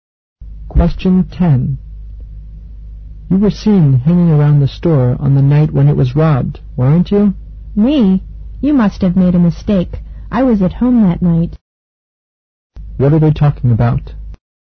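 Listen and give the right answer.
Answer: A store robbery (the man denies being near the store).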